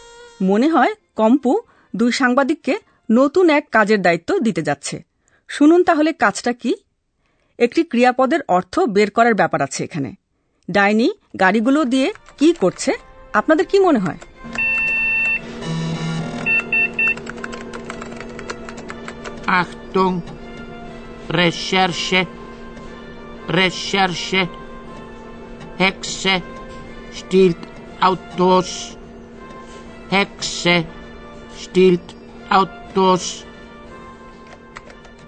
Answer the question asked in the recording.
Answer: একটা ডাইনি নিজেকে কার্নিভালের পোশাকে ঢেকে গাড়ি চুরি করেছে